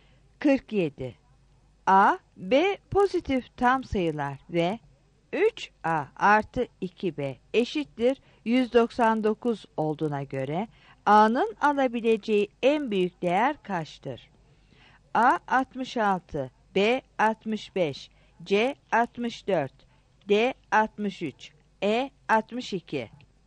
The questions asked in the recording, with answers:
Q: A B pozitif tam sayılar ve 3A artı 2B eşittir 199 olduğuna göre A'nın alabileceği en büyük değer kaçtır?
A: 47 B